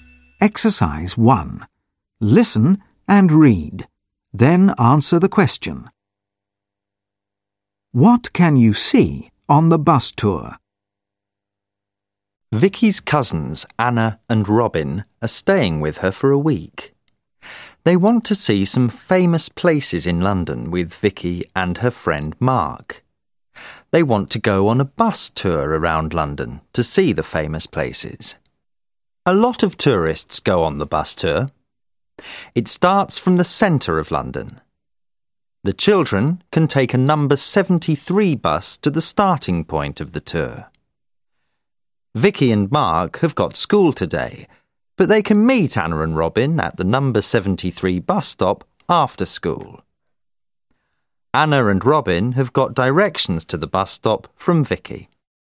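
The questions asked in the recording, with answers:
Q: What can you see on the bus tour?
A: The famous places in London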